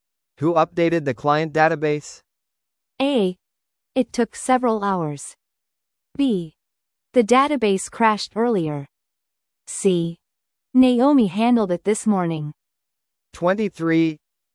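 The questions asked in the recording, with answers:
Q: Who updated the client database?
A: C: Naomi handled it this morning.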